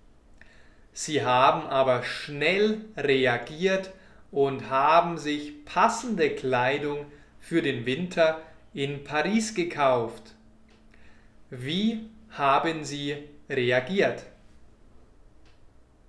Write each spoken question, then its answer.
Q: Wie haben Sie reagiert?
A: Schnell. Sie haben schnell reagiert.